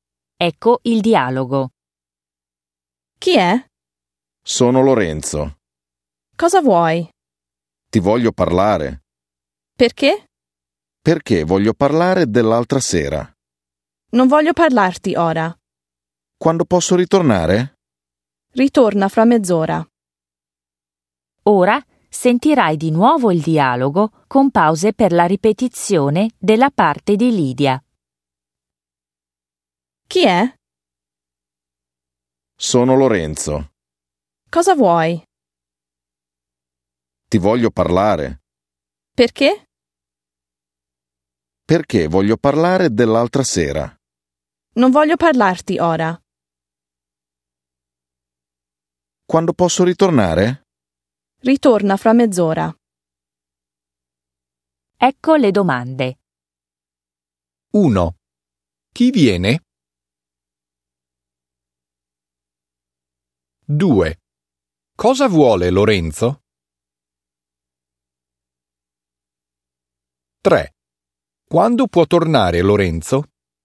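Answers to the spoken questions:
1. Lorenzo
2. Vuole parlare (dell'altra sera) con Lydia
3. Fra mezz'ora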